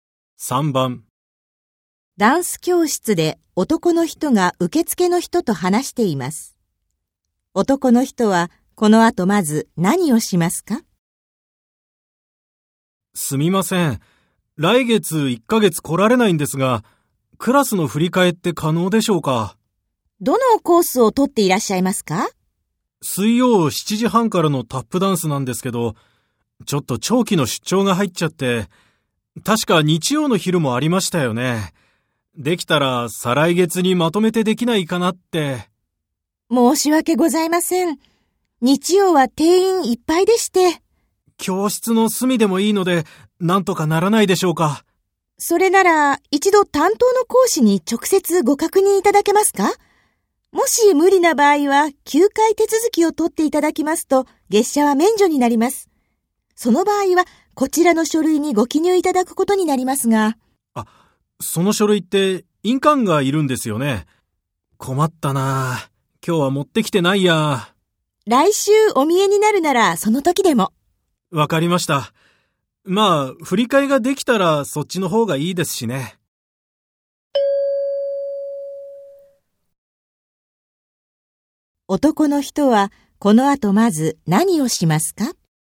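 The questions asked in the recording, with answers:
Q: 男の人はこの後まず何をしますか?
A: 担当の講師に直接確認する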